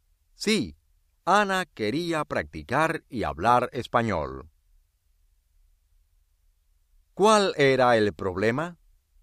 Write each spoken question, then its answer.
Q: ¿Cuál era el problema?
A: Ana no quería ir a la escuela.